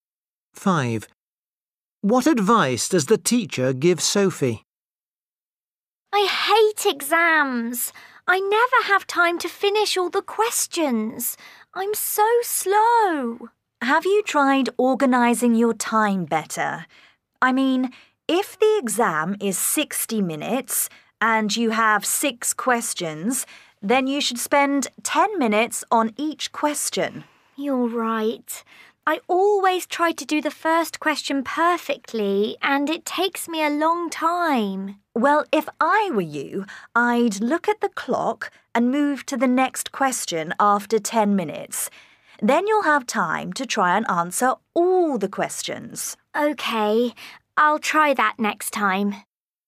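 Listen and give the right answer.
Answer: Organise her time: spend 10 minutes on each question, then move on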